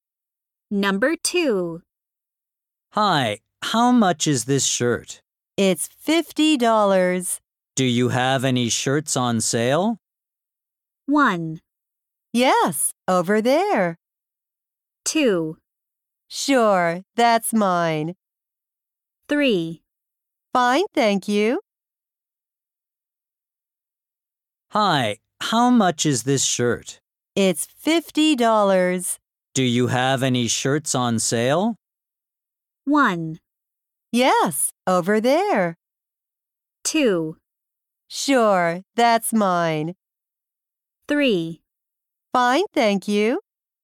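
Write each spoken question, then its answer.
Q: Do you have any shirts on sale?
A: 1: Yes, over there.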